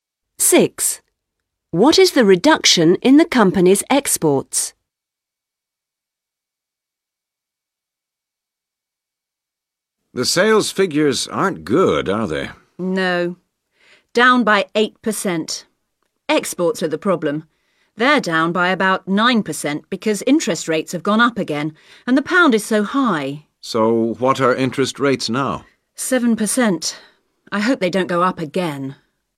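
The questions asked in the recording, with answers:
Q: What is the reduction in the company's exports?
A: about 9%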